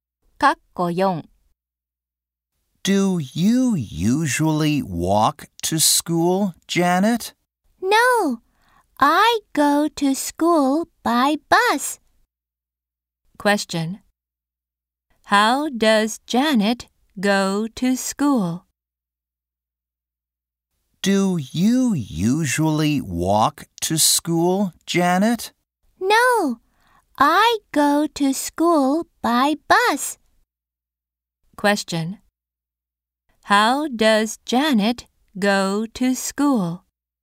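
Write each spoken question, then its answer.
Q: How does Janet go to school?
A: By bus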